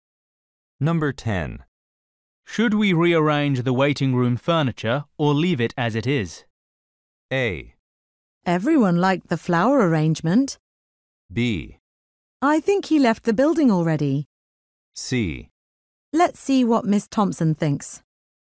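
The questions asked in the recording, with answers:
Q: Should we rearrange the waiting room furniture or leave it as it is?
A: C: Let's see what Miss Thompson thinks.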